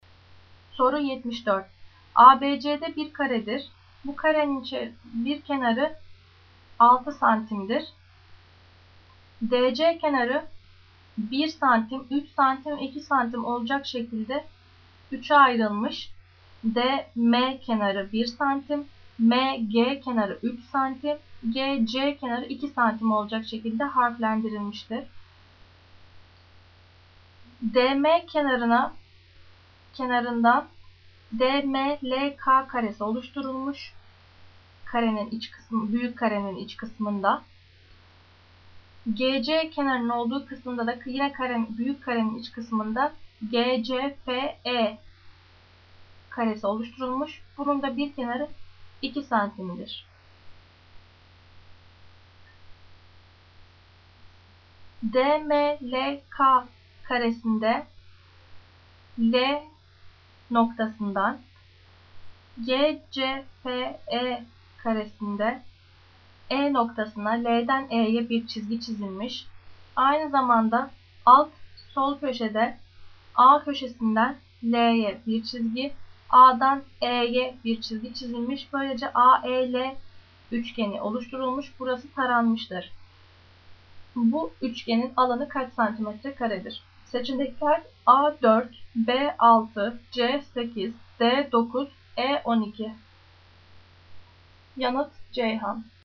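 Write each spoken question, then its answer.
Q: Bu üçgenin alanı kaç santimetre karedir?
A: C: 8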